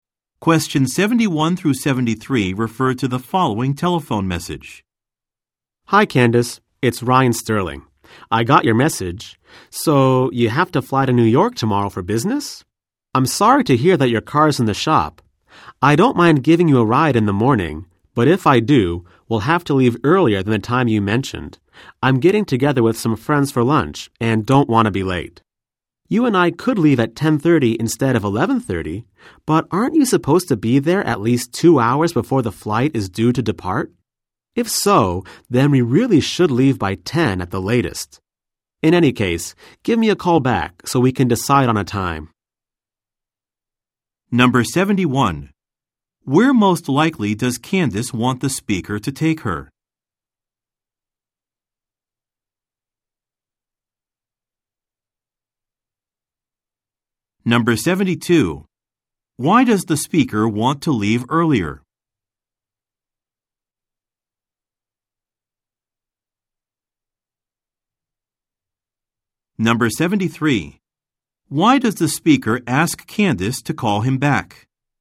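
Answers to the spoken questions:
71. To the airport
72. He is meeting friends for lunch and doesn't want to be late
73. To decide on a departure time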